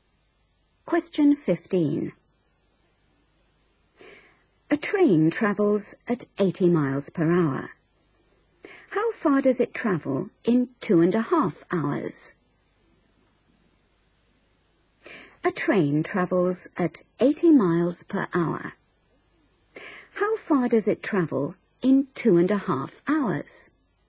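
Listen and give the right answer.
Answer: 200 miles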